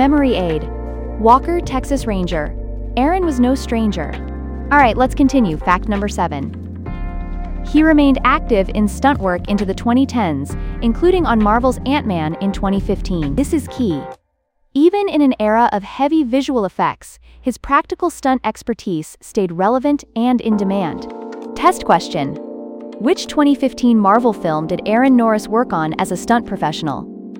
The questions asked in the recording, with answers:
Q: which 2015 Marvel film did Aaron Norris work on as a stunt professional?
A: Ant-Man.